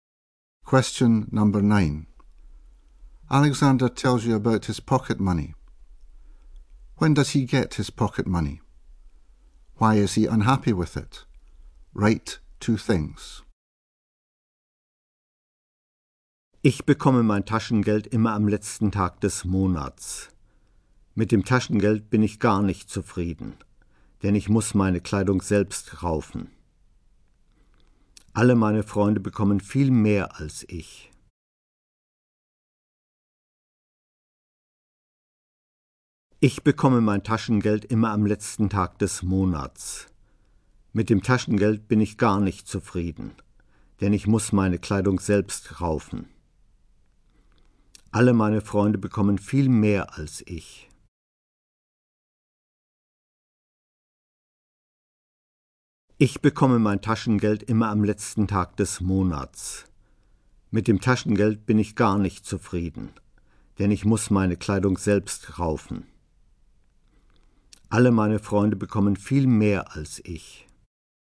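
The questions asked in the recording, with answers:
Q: When does he get his pocket money?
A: On the last day of the month

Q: Why is he unhappy with it?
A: He has to buy his own clothes; his friends get much more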